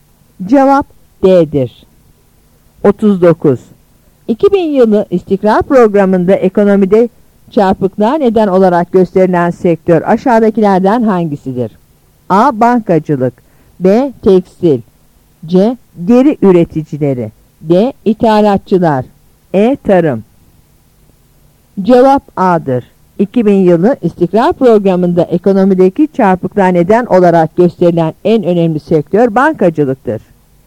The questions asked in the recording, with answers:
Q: 2000 yılı İstikrar Programı'nda ekonomide çarpıklığa neden olarak gösterilen sektör aşağıdakilerden hangisidir?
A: Cevap A'dır.